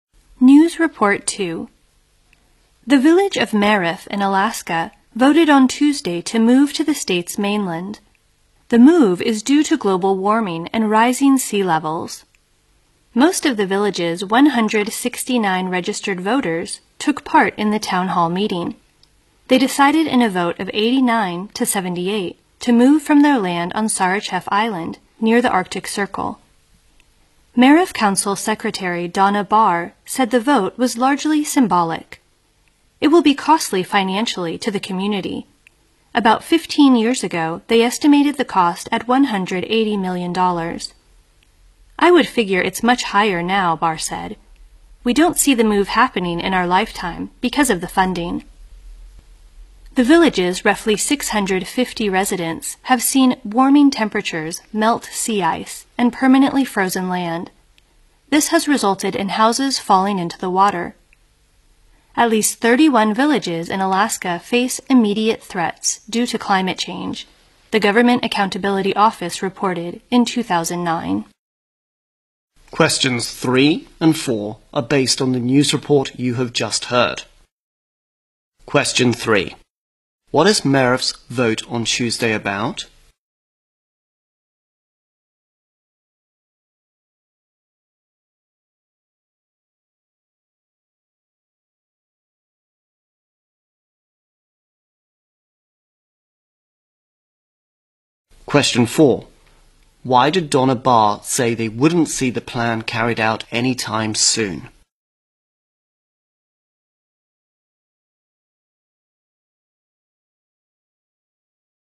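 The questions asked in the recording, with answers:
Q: What is Merif's vote on Tuesday about?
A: Moving the village to the mainland

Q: Why did Donna Barr say they wouldn't see the plan carried out anytime soon?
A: Because of the funding; the move is very costly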